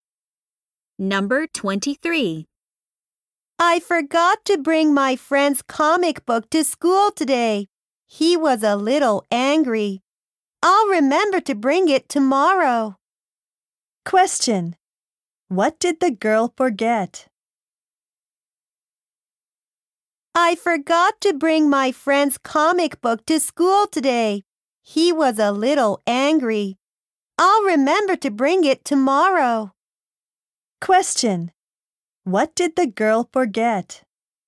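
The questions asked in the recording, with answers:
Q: What did the girl forget?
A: Her friend's comic book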